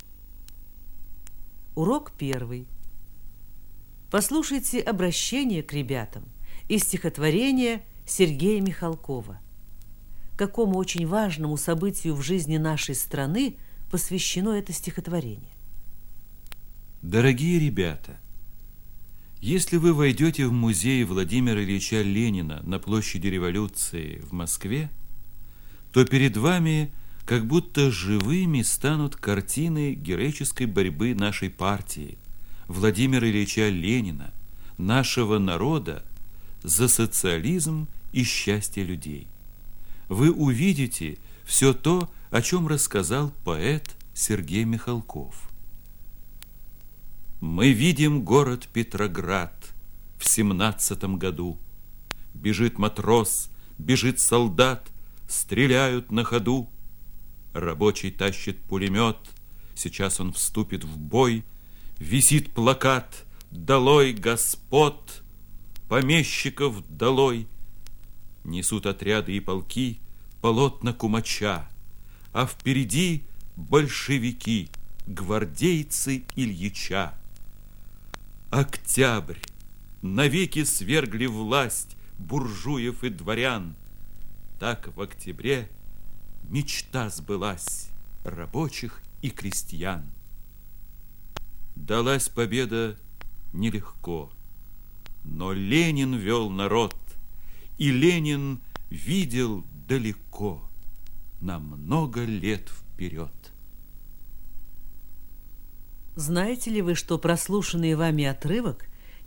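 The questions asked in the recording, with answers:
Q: Какому очень важному событию в жизни нашей страны посвящено это стихотворение?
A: Октябрьской революции 1917 года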